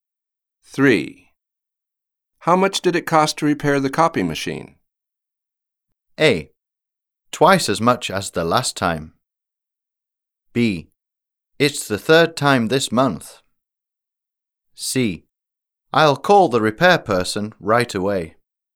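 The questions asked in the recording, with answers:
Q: How much did it cost to repair the copy machine?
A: A: Twice as much as the last time.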